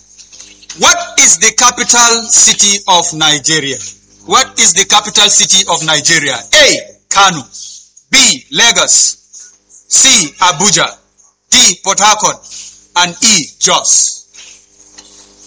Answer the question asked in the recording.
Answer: C, Abuja. A round of applause.